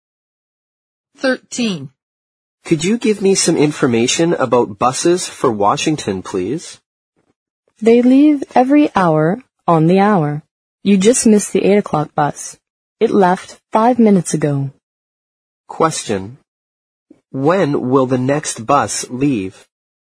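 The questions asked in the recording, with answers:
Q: When will the next bus leave?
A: At 9 o'clock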